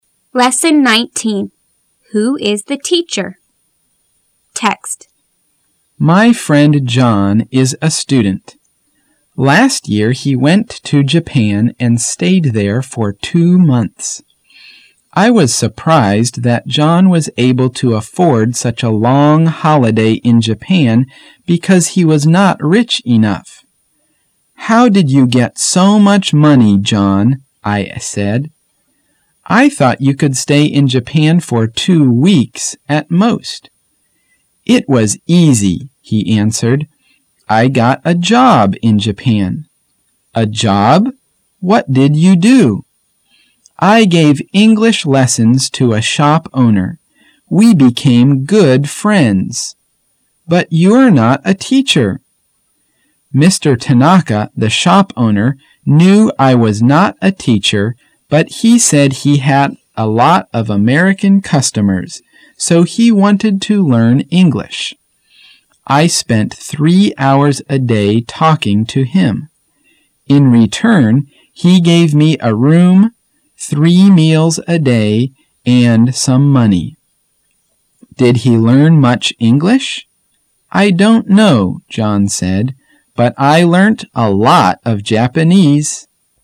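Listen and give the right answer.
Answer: John, who gave English lessons to the shop owner Mr. Tanaka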